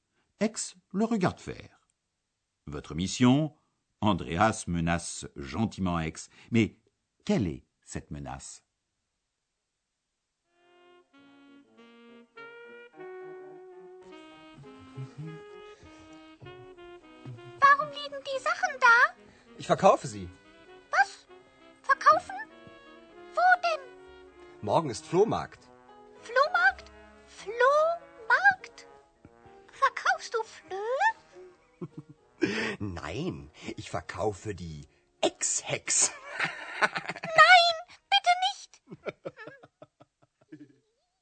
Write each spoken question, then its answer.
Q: Mais quelle est cette menace?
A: Andreas menace Ex de la vendre elle aussi.